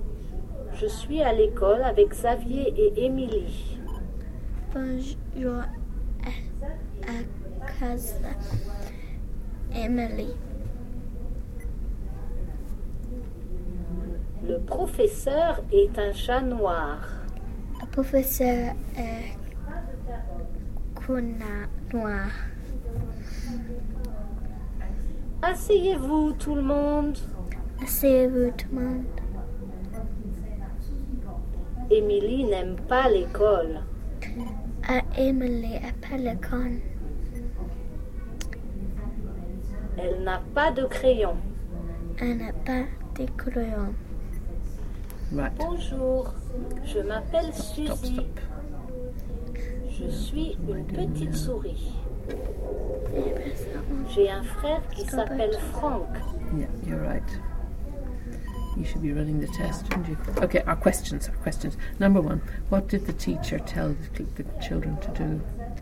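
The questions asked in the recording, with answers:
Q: what did the teacher tell the children to do?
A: Sit down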